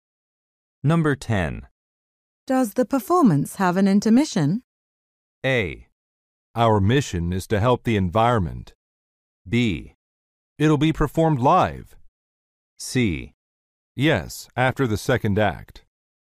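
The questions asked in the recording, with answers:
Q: Does the performance have an intermission?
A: C: Yes, after the second act.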